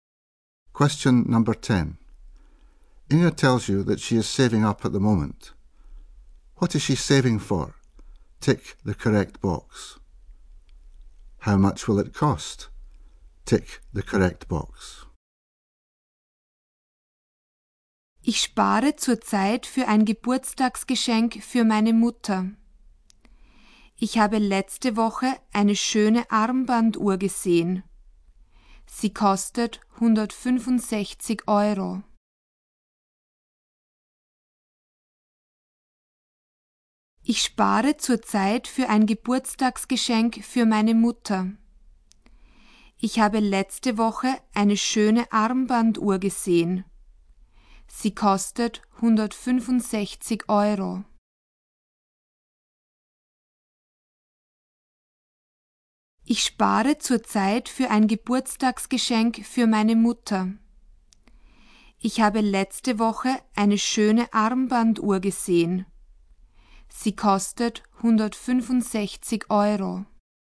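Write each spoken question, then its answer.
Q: What is she saving for?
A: A birthday present (a watch) for her mother

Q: How much will it cost?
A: 165 euros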